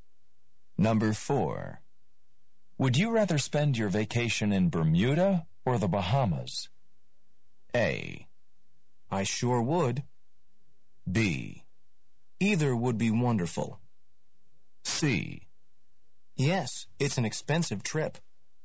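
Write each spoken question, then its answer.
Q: Would you rather spend your vacation in Bermuda or the Bahamas?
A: B: Either would be wonderful.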